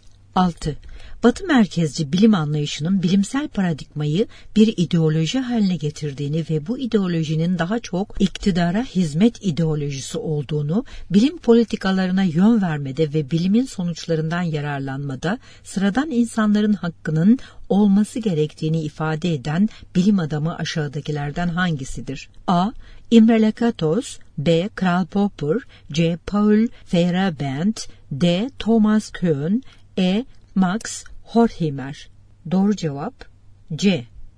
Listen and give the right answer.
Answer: Doğru cevap C.